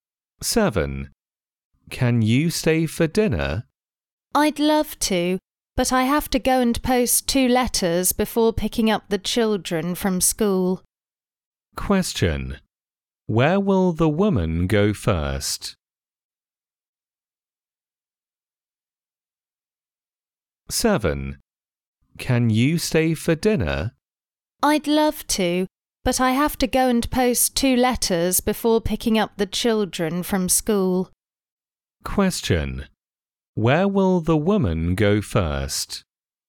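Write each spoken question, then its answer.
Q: Where will the woman go first?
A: To the post office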